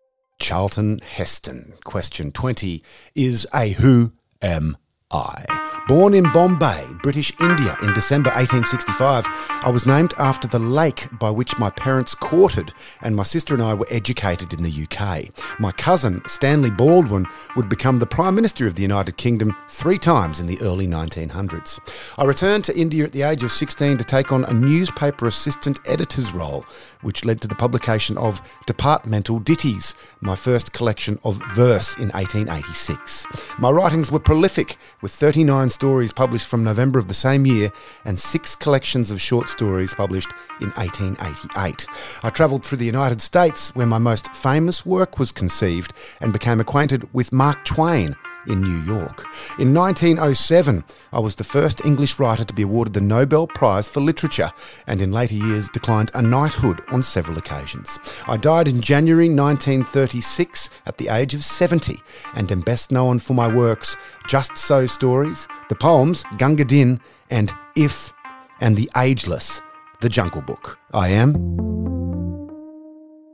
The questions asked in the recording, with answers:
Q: Is a who am I?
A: I am Rudyard Kipling.